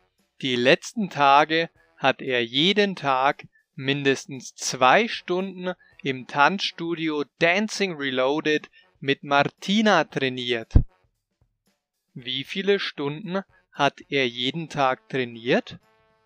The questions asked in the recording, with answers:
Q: Wie viele Stunden hat er jeden Tag trainiert?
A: Mindestens zwei. Er hat die letzten Tage mindestens zwei Stunden trainiert.